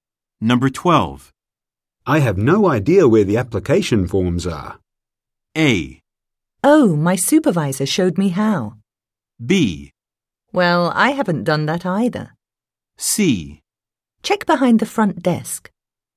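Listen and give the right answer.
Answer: C: Check behind the front desk.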